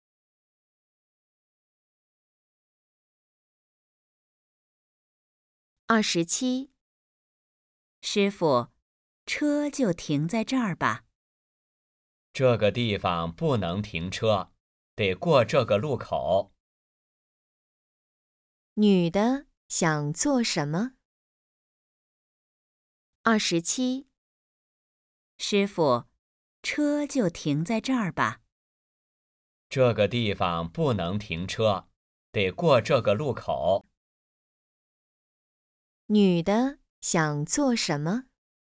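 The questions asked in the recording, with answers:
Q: 女的想做什么?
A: 停车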